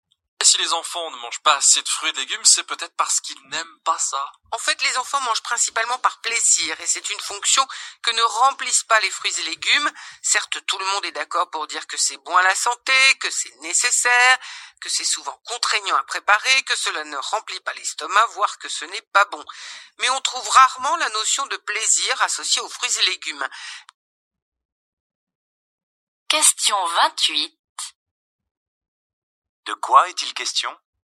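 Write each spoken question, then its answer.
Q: De quoi est-il question ?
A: Les enfants ne mangent pas assez de fruits et légumes car ils n'y associent pas de plaisir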